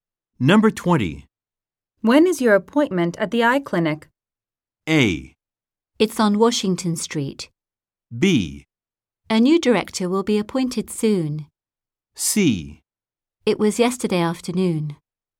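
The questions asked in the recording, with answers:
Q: When is your appointment at the eye clinic?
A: C: It was yesterday afternoon.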